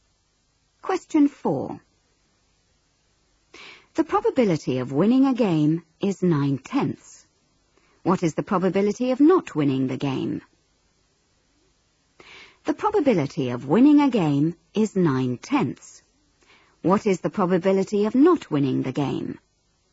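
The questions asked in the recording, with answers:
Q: What is the probability of not winning the game?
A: 1/10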